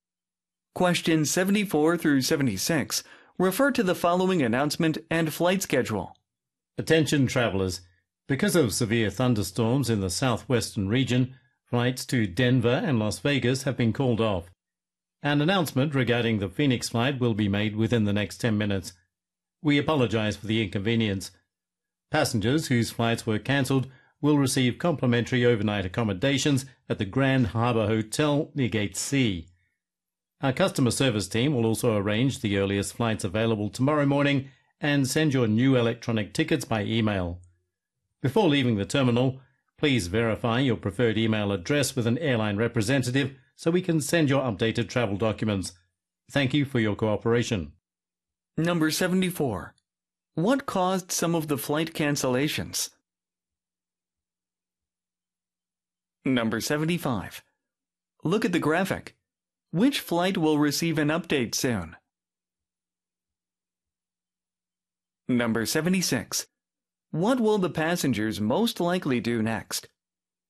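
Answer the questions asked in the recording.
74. Severe thunderstorms
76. Verify their email address with an airline representative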